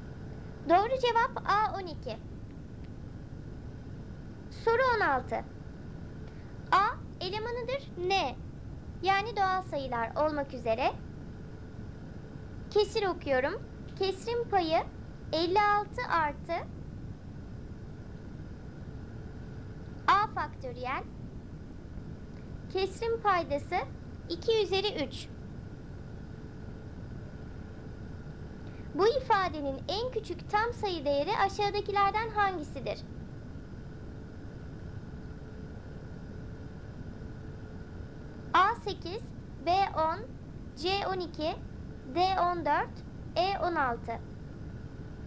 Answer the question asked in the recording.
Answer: Doğru cevap B 10.